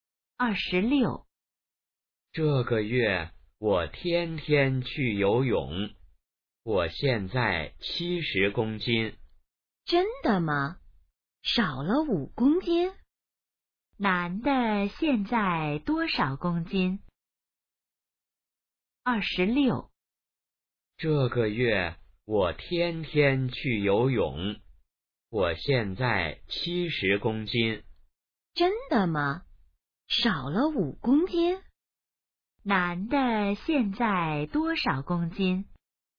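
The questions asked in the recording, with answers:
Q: 男的现在多少公斤?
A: 70公斤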